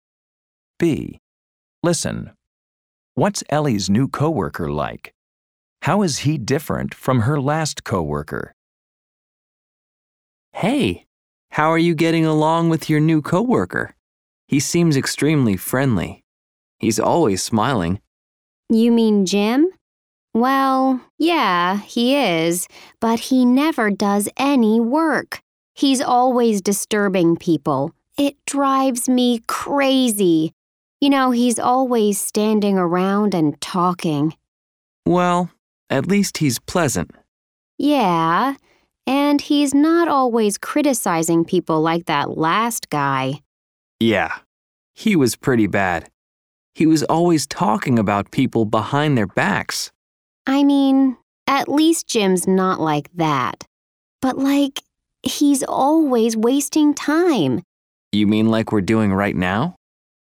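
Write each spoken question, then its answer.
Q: What's Ellie's new coworker like?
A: Friendly and always smiling, but he never does any work; he's always disturbing people and wasting time

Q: How is he different from her last coworker?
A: He doesn't criticize people or talk about them behind their backs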